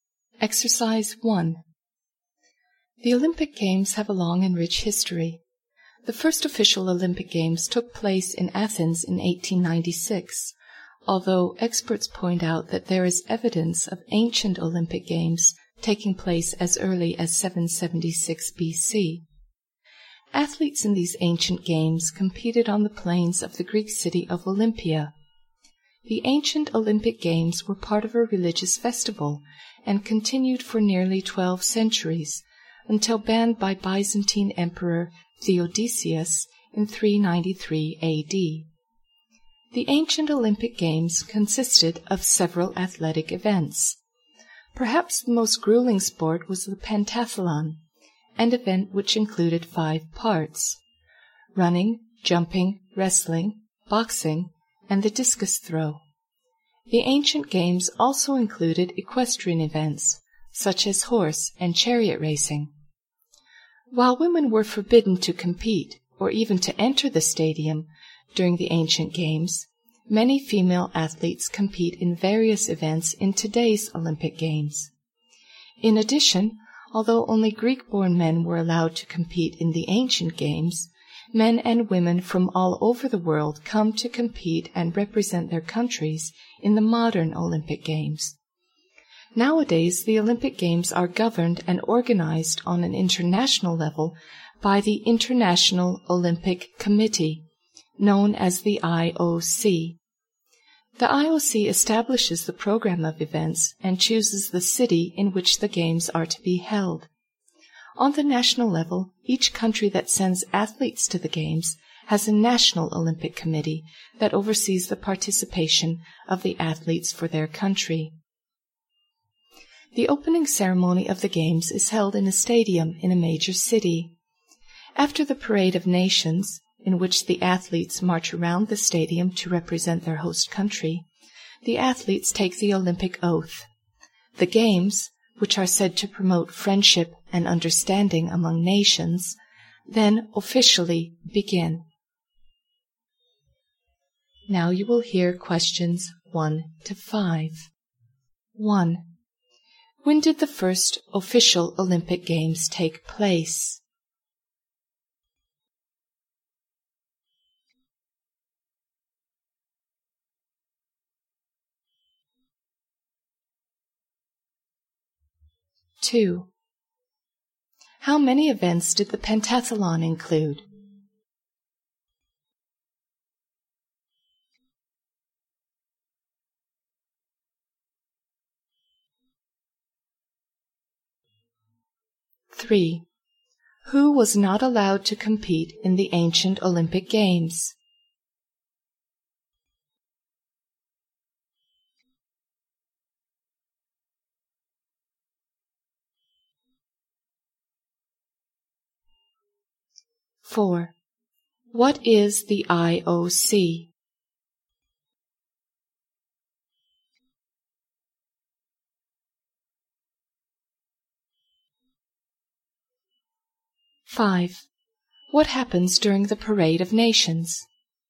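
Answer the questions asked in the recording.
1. In 1896, in Athens
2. Five
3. Women and men who were not born in Greece
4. The International Olympic Committee, which governs and organizes the Olympic Games
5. The athletes march around the stadium representing their countries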